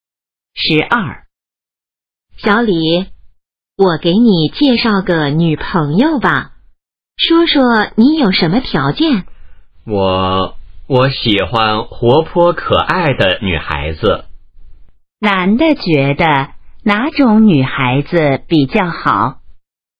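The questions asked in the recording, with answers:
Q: 男的觉得哪种女孩子比较好?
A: 活泼可爱的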